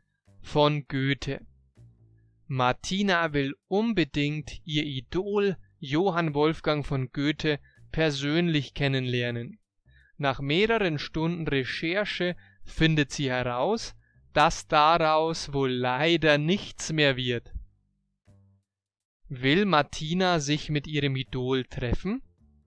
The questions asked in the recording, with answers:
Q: Will Martina sich mit ihrem Idol treffen?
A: Ja, das will sie.